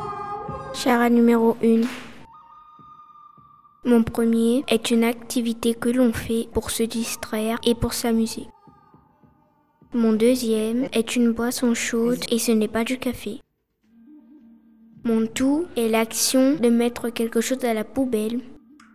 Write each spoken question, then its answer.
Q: Mon tout est l'action de mettre quelque chose à la poubelle.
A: jeter.